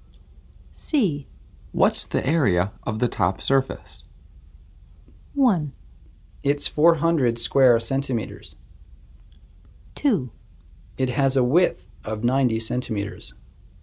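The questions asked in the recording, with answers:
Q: What's the area of the top surface?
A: 1: It's 400 square centimeters.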